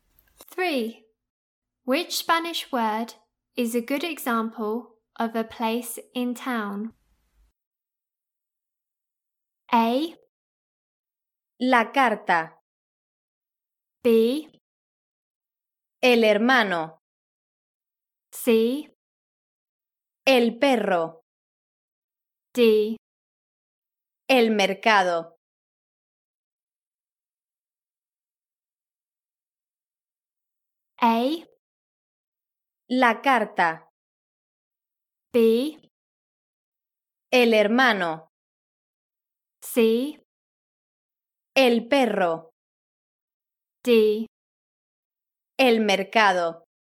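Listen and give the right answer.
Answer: D: El mercado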